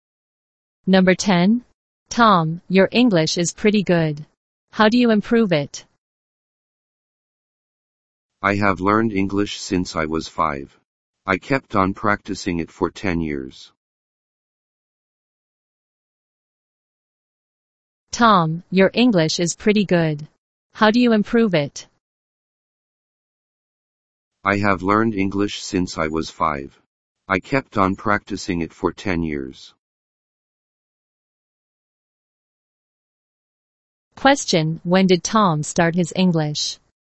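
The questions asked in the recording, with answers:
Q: Question, when did Tom start his English?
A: When he was 5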